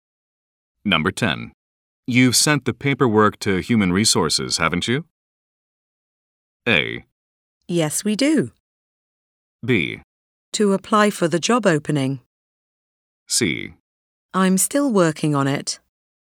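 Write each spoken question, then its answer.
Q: You've sent the paperwork to Human Resources, haven't you?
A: C: I'm still working on it.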